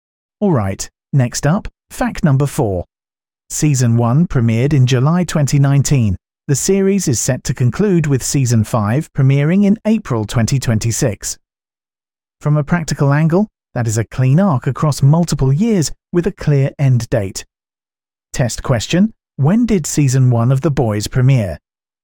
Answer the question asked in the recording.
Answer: Correct answer, July 2019.